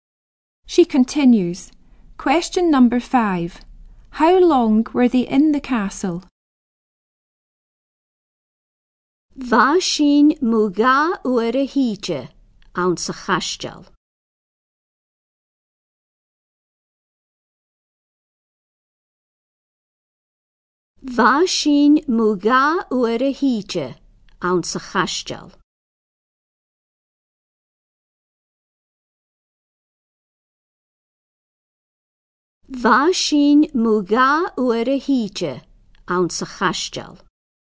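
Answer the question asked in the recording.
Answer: About an hour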